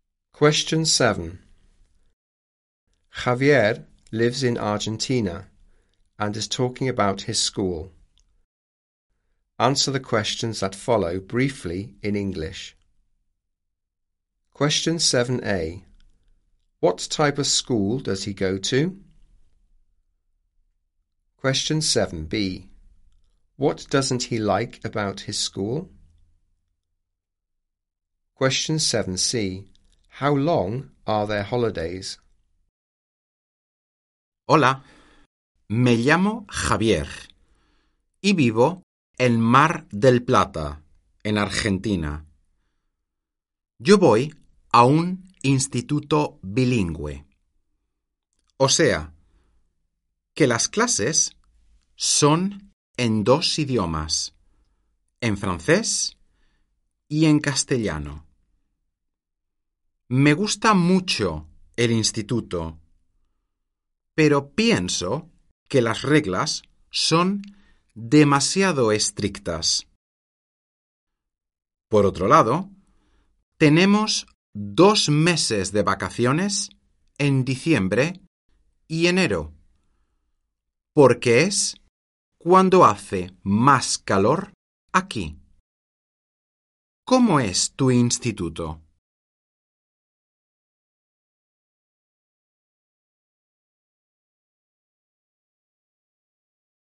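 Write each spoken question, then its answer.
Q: What type of school does he go to?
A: A bilingual school (French and Spanish)

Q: What doesn't he like about his school?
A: The rules are too strict

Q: How long are their holidays?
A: Two months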